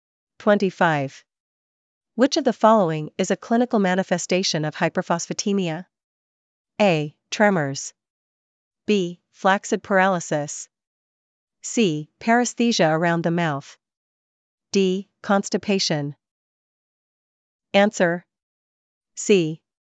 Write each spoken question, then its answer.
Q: Which of the following is a clinical manifestation of hyperphosphatemia?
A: C. Paresthesia around the mouth.